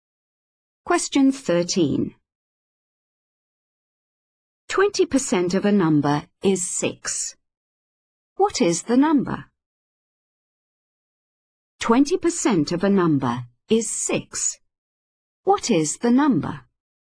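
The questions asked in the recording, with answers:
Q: 20% of a number is 6. What is the number?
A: 30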